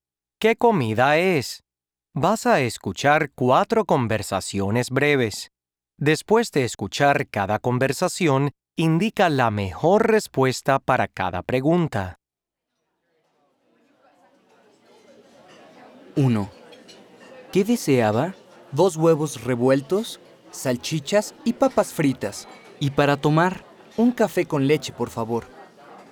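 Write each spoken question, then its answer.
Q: ¿Qué comida es?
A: el desayuno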